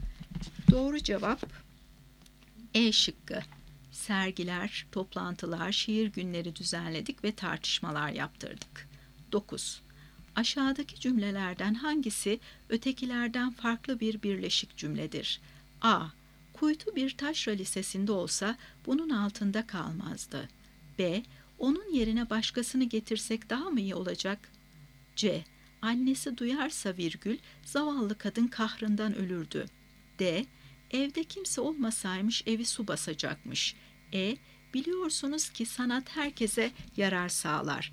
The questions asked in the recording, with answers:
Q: Aşağıdaki cümlelerden hangisi ötekilerden farklı bir birleşik cümledir?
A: Doğru cevap E şıkkı. Biliyorsunuz ki sanat herkese yarar sağlar.